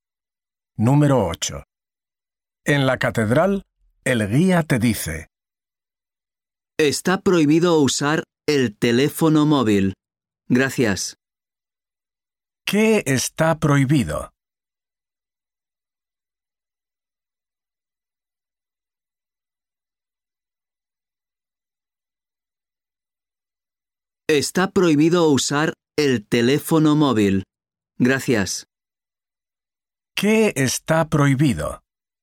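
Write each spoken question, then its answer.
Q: ¿Qué está prohibido?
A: Usar el teléfono móvil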